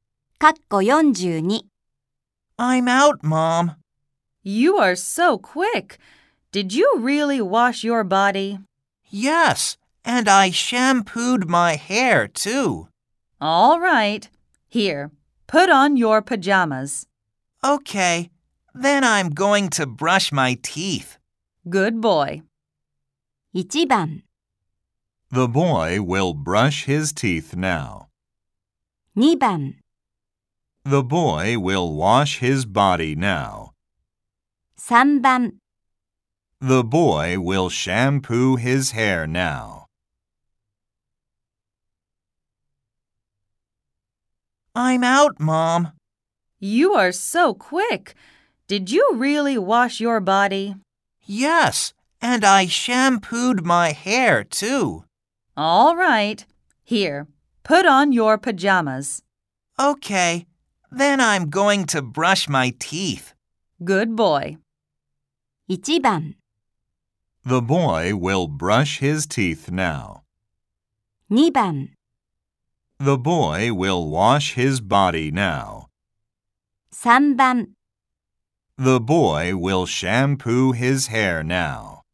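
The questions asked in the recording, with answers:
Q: 1番 The boy will brush his teeth now. 2番 The boy will wash his body now. 3番 The boy will shampoo his hair now.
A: 1: The boy will brush his teeth now.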